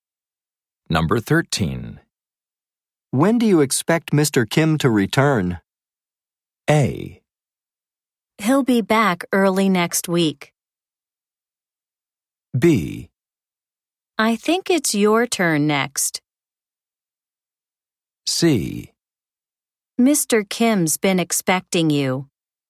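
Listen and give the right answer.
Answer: A: He'll be back early next week.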